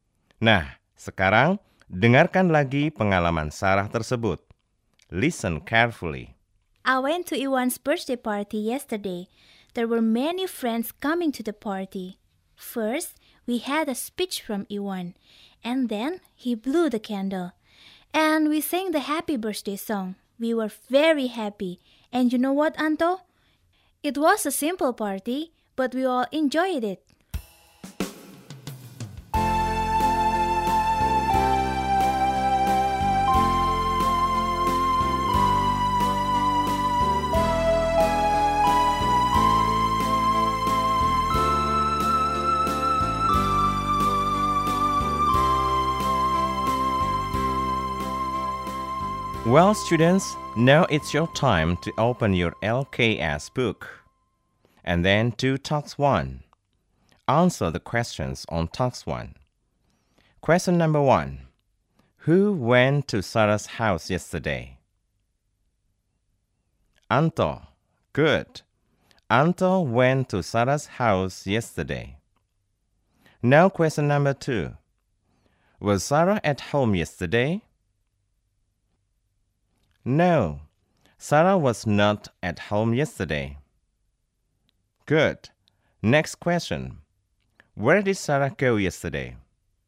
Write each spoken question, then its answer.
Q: Where did Sarah go yesterday?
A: To Iwan's birthday party.